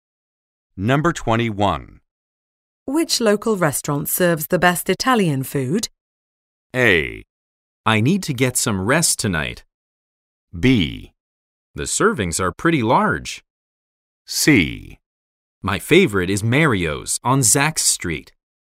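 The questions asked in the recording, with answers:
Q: Which local restaurant serves the best Italian food?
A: C: My favorite is Mario's on Zach's Street.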